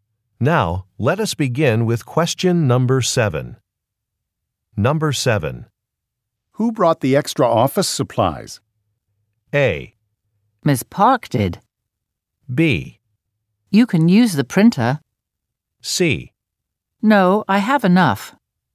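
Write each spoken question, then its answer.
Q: Who brought the extra office supplies?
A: A: Ms. Park did.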